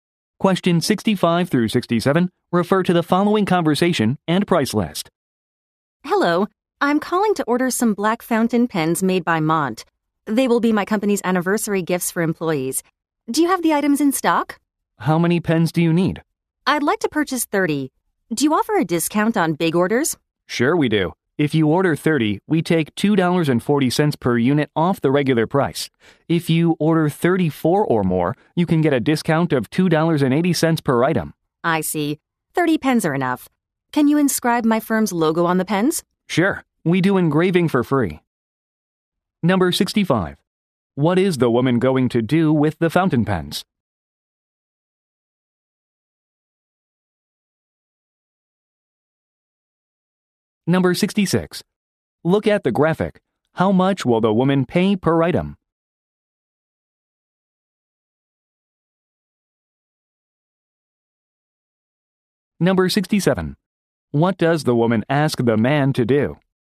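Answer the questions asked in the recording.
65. Give them to employees as anniversary gifts
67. Engrave her firm's logo on the pens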